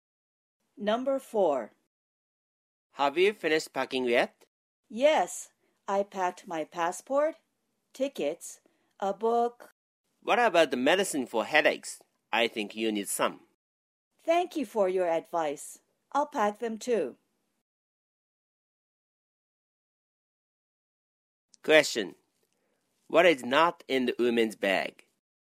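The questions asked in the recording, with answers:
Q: What is not in the woman's bag?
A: medicine for headaches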